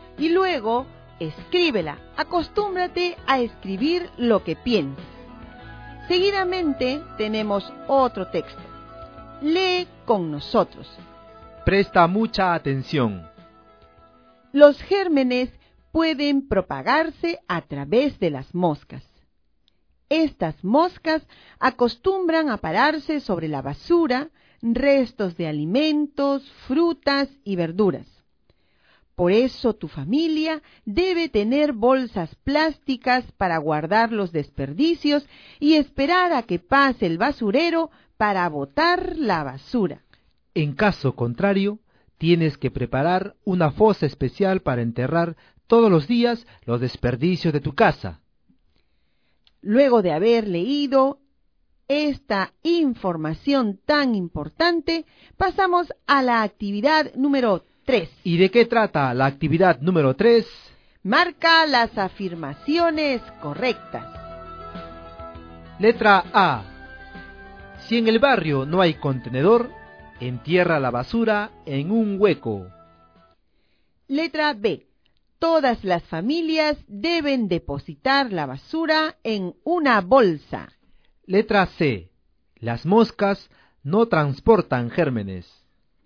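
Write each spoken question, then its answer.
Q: Marca las afirmaciones correctas.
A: A y B: enterrar la basura si no hay contenedor; depositar la basura en una bolsa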